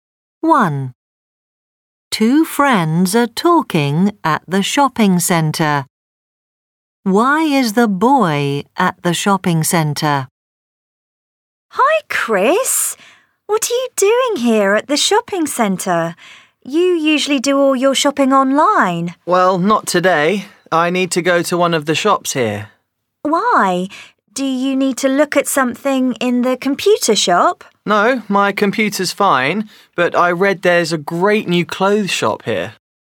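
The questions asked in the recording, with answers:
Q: Why is the boy at the shopping centre?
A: To visit a great new clothes shop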